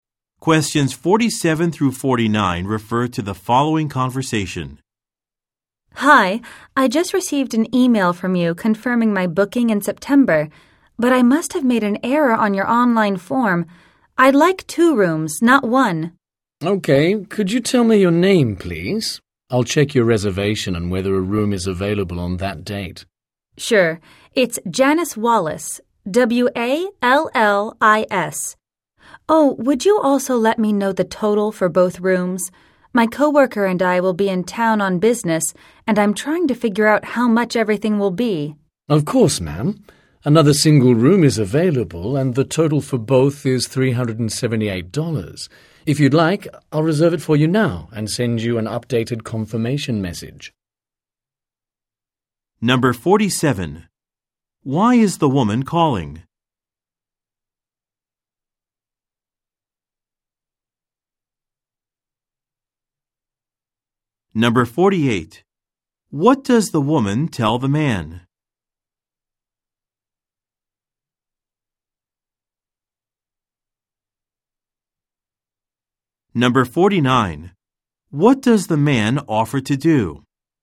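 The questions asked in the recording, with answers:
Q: Why is the woman calling?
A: To change her booking to two rooms instead of one

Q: What does the man offer to do?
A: Reserve the room now and send an updated confirmation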